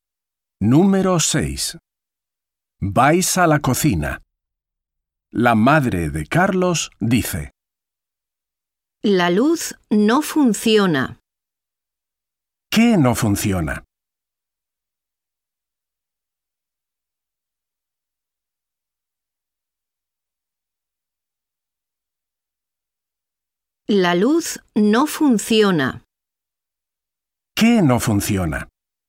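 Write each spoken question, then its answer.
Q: ¿Qué no funciona?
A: la luz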